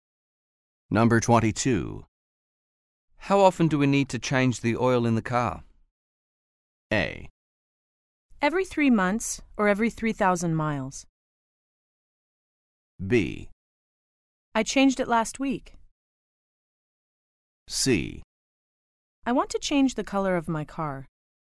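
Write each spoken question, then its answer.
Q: How often do we need to change the oil in the car?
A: A: Every 3 months or every 3,000 miles.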